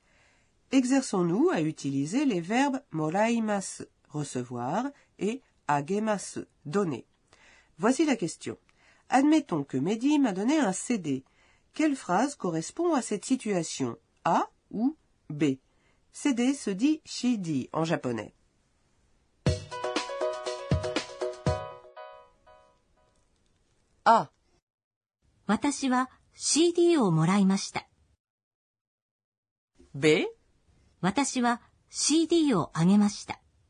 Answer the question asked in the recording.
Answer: La bonne réponse est donc bien A.